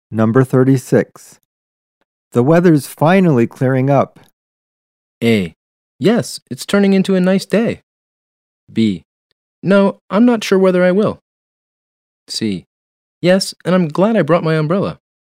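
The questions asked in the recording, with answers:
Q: The weather's finally clearing up.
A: A: Yes, it's turning into a nice day.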